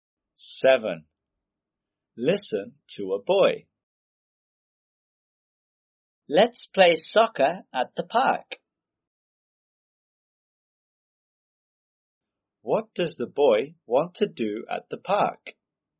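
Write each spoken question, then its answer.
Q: What does the boy want to do at the park?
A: play soccer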